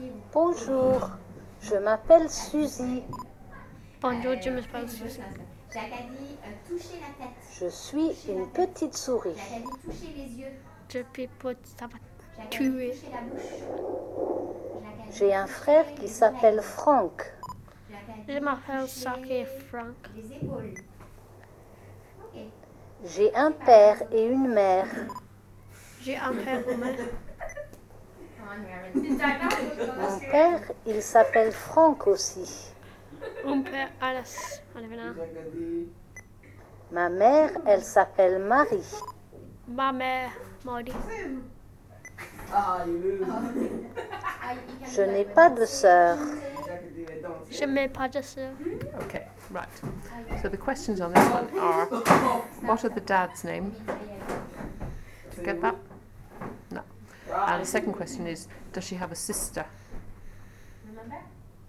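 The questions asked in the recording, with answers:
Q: what are the dad's name?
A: Franck

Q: does she have a sister?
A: No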